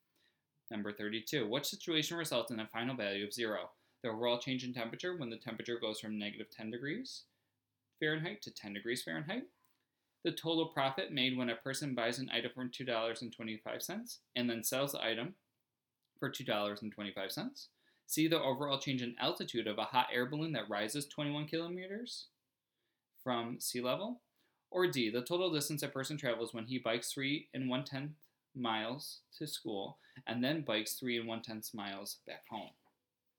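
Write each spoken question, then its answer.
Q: which situation results in a final value of zero?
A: B: The total profit made when a person buys an item for $2.25 and then sells the item for $2.25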